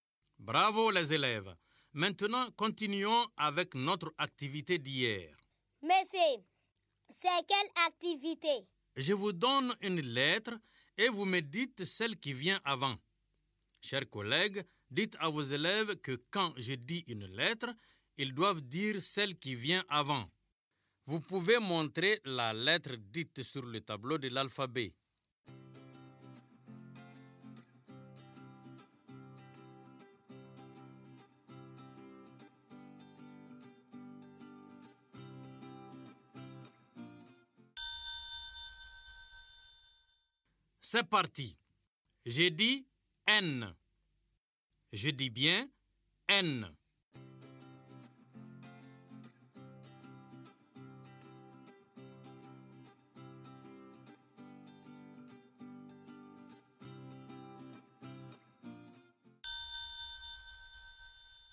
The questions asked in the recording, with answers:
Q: C'est parti. J'ai dit N. Je dis bien N.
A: Monsieur, la lettre qui vient avant N, c'est M.